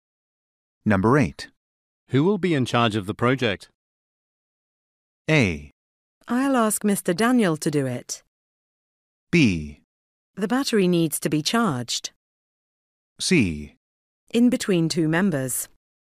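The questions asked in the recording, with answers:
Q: Who will be in charge of the project?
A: A: I'll ask Mr. Daniel to do it.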